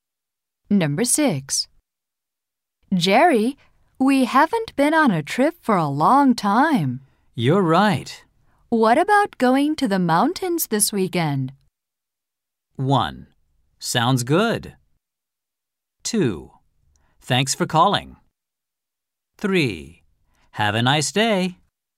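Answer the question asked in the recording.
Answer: 1: Sounds good.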